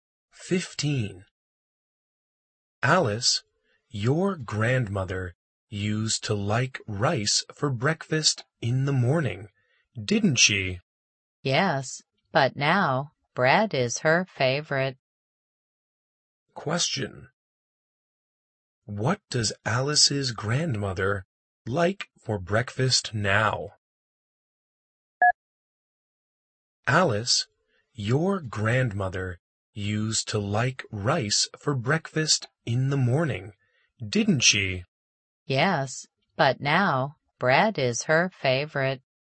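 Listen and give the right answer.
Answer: Bread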